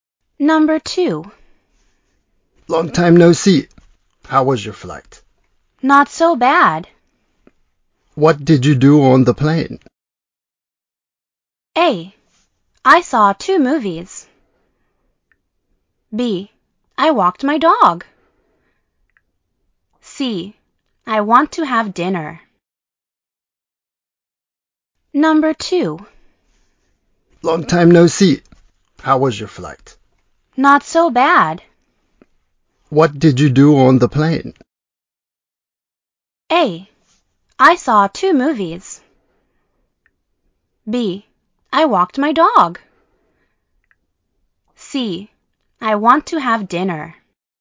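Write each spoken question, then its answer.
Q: What did you do on the plane?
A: A: I saw 2 movies.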